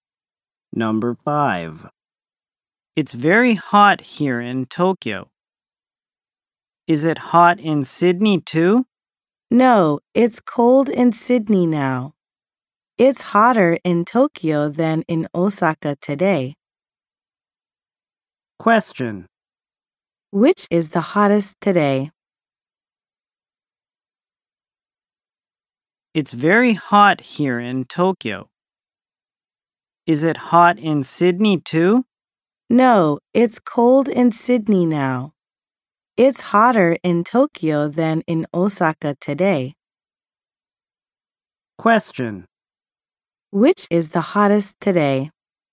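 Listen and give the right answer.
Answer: Tokyo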